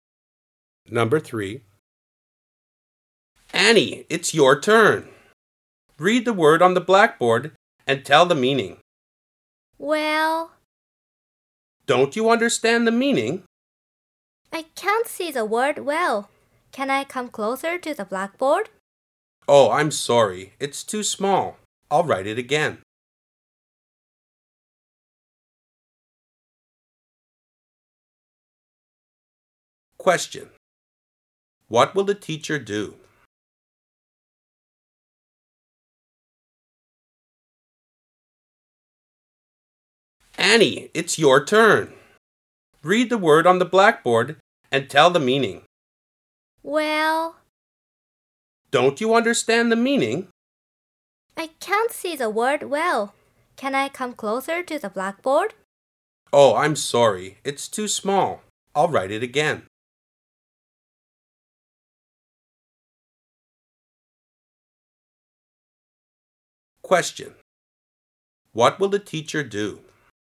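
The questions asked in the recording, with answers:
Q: What will the teacher do?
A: Write the word again (bigger)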